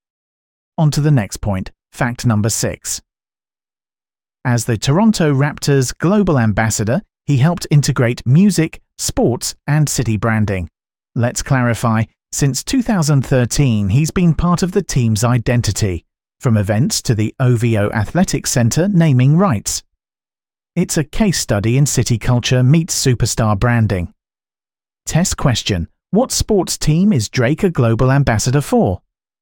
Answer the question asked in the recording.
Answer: Correct answer. Toronto Raptors.